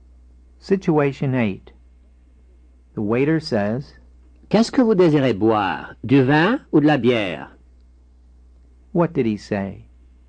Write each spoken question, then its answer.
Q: What did he say?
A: What would you like to drink, wine or beer?